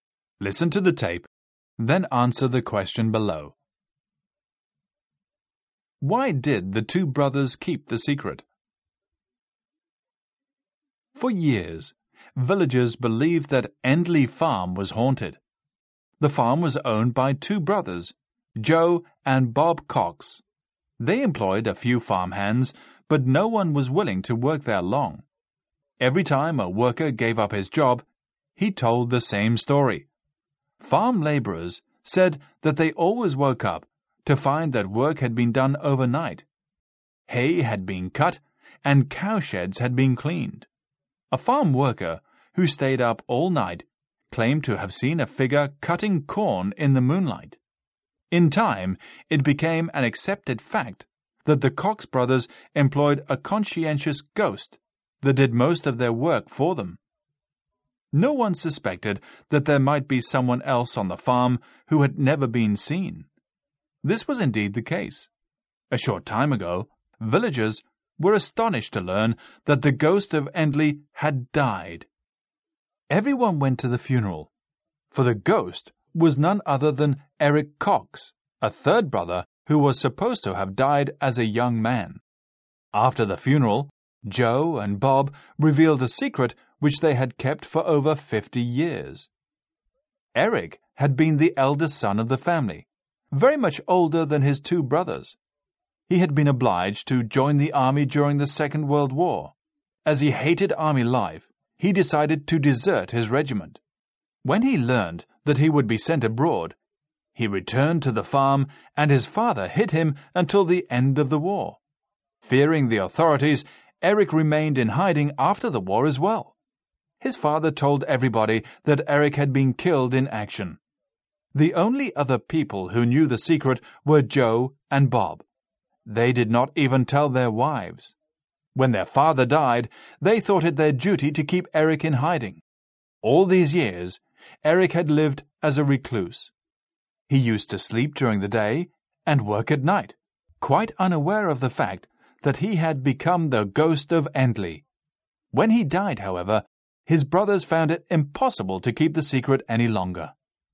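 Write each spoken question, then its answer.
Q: Why did the two brothers keep the secret?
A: To keep Eric hidden, because he had deserted the army and feared the authorities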